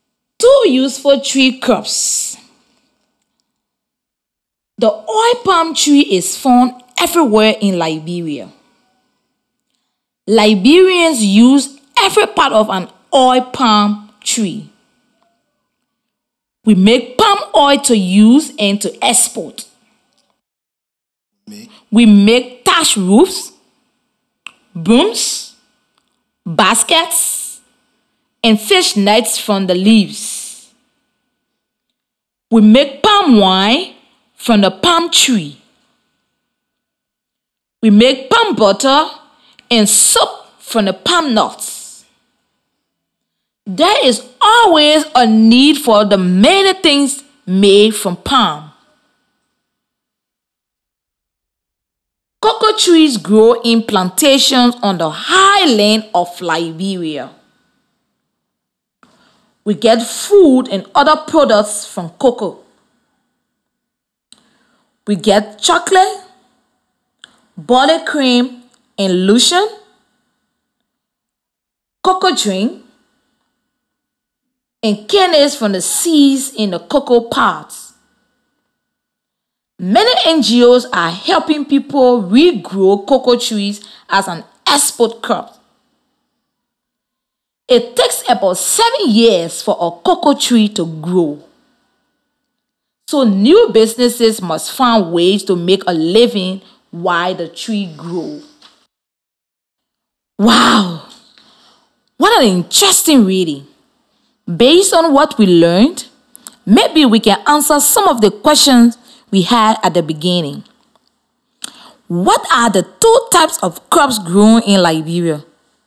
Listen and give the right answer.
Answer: The two types of tree crops that the passage is talking about are cocoa trees and oil palm trees.